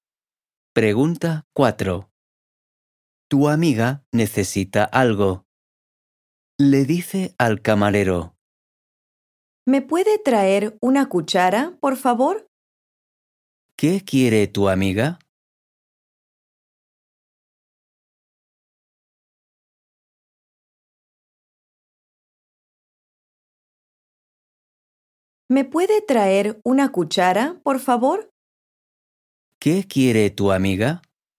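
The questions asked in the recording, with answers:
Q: ¿Qué quiere tu amiga?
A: Una cuchara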